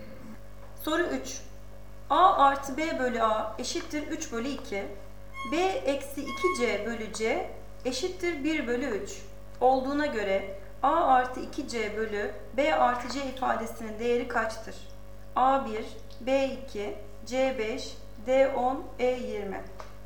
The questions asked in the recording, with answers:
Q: Olduğuna göre A artı 2C bölü B artı C ifadesinin değeri kaçtır?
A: Doğru cevap B 2.